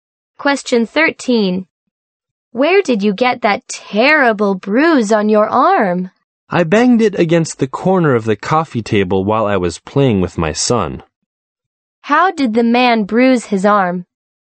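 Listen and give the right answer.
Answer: He banged it against the corner of the coffee table while playing with his son.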